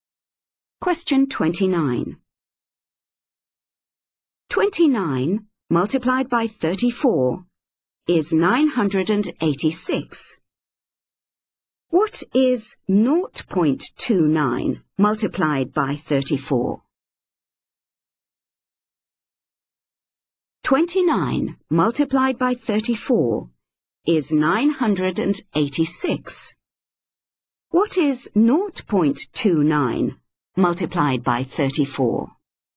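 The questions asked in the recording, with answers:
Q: What is 0.29 multiplied by 34?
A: 9.86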